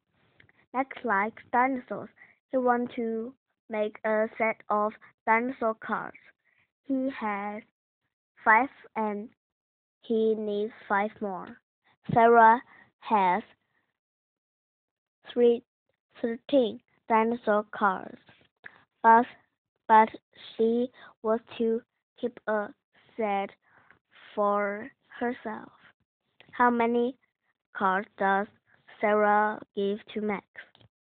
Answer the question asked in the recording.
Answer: Sarah gave Max 3 cards because 13 take away 3 leaves 10.